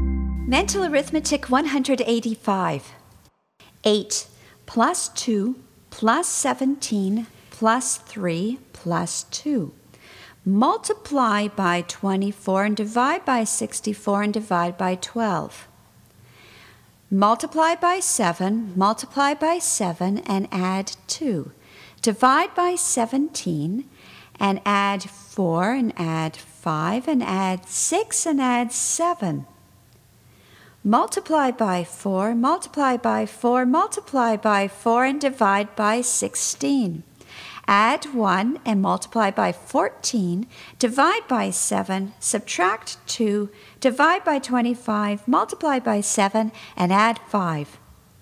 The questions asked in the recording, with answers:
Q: 8 plus 2 plus 17 plus 3 plus 2. Multiply by 24 and divide by 64 and divide by 12. Multiply by 7, multiply by 7 and add 2. Divide by 17 and add 4 and add 5 and add 6 and add 7. Multiply by 4, multiply by 4, multiply by 4, and divide by 16. Add 1 and multiply by 14, divide by 7, subtract 2, divide by 25, multiply by 7, and add 5.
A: And the answer is 61.